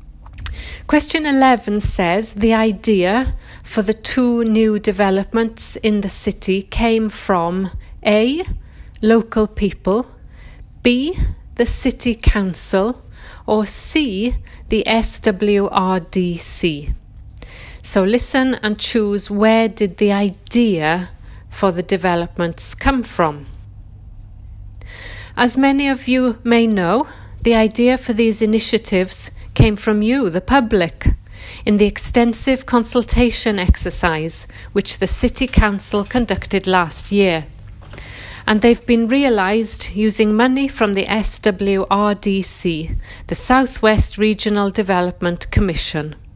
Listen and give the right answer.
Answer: So the answer was the idea came from the local people or the public.